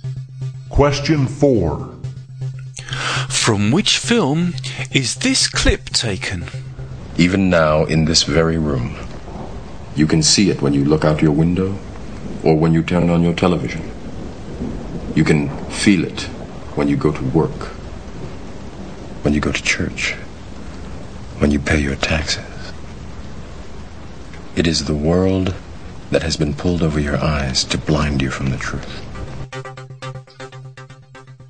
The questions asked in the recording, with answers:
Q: From which film is this clip taken?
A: This is the Matrix.